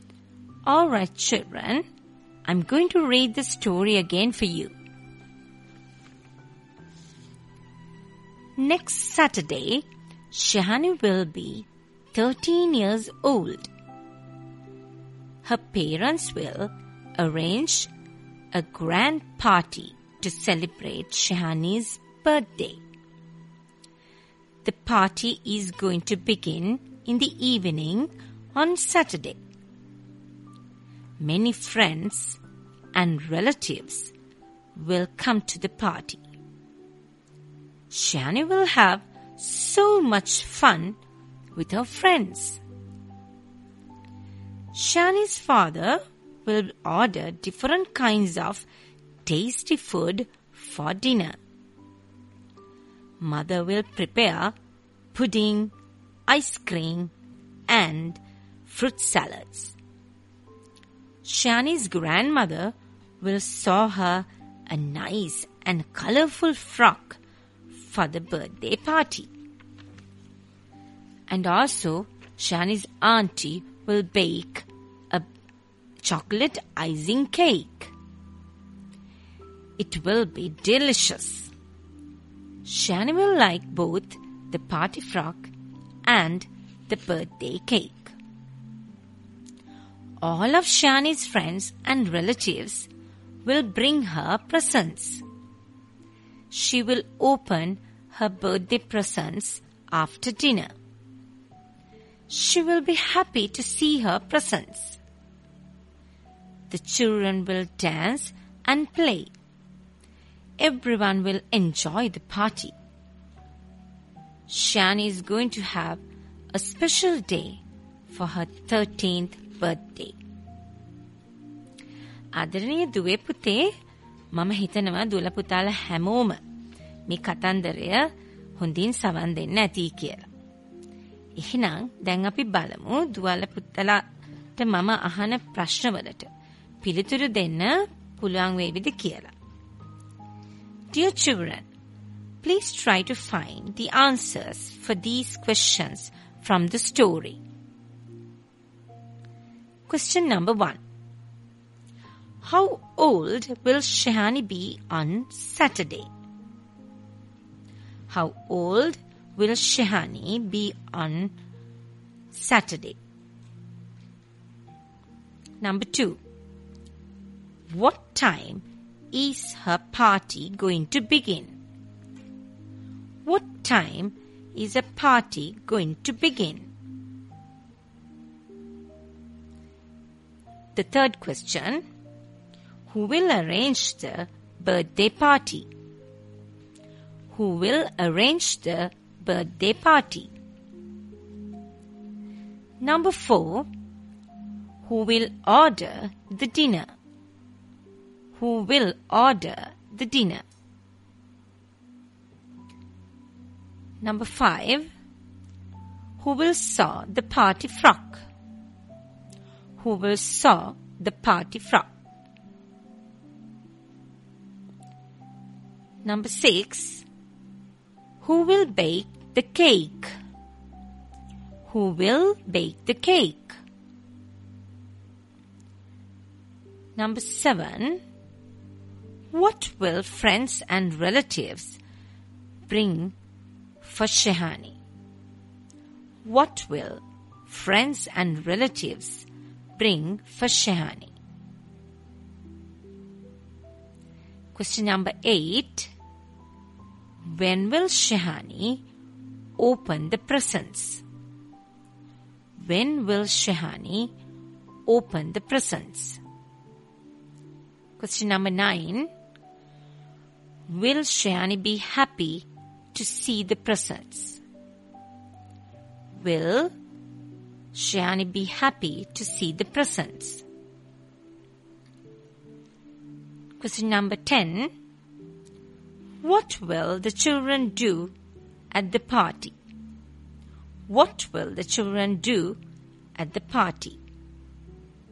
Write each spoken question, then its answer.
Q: How old will Shehani be on Saturday?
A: The answer is, she will be 13 years old.

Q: What time is her party going to begin?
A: It is going to begin in the evening.

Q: who will arrange the birthday party?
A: Shani's parents will arrange the birthday party.

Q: who will order the dinner?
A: Father will order the dinner.

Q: who will sew the party frock?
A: The answer is, grandmother will sew the party frock.

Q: who will bake the cake?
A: Shani's aunt will bake the cake.

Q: what will friends and relatives bring for Shehani?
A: The answer is they will bring presents.

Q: When will Shehani open the presents?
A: She will open the presents after dinner.

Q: Will Shehani be happy to see the presents?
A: The answer is yes, she will be happy to see them.

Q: What will the children do at the party?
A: They will dance and play.